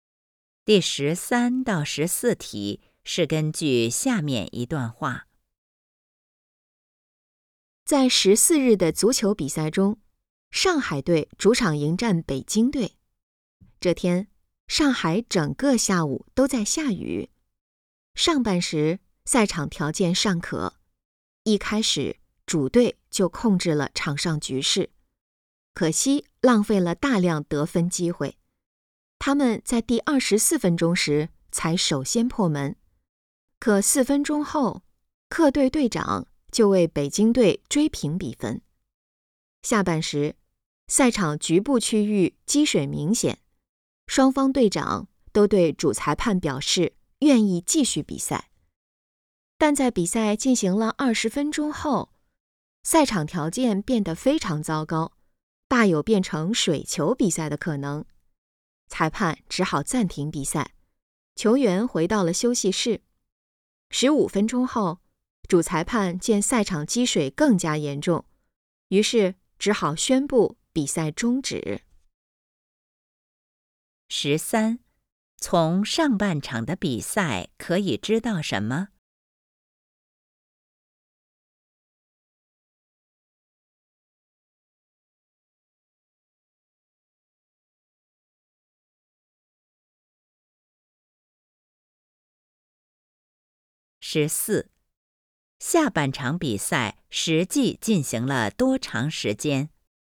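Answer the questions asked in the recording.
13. 主队控制了局势,但浪费了很多得分机会,比分是1比1
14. 20分钟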